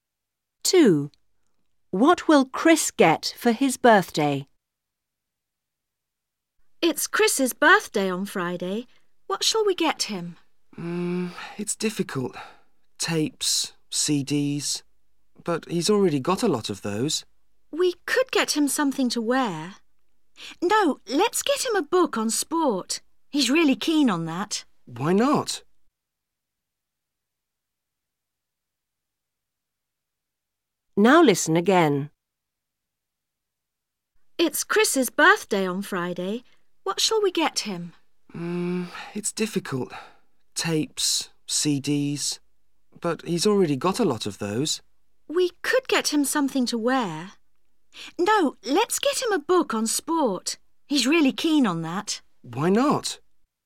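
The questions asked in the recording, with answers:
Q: What will Chris get for his birthday?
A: A book on sport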